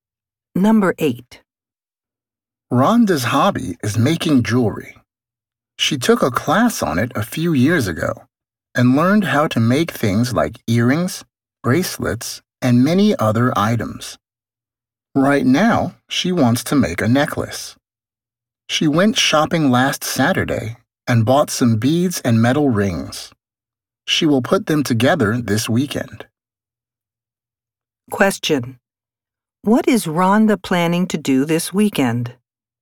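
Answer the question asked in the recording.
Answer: Make a necklace.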